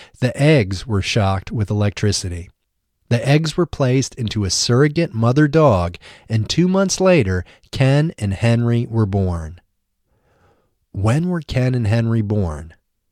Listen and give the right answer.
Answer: Ken and Henry were born 2 months later.